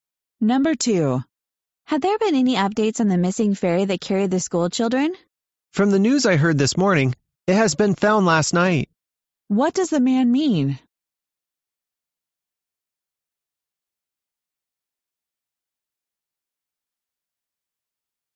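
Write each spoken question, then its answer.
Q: What does the man mean?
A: The missing ferry was found last night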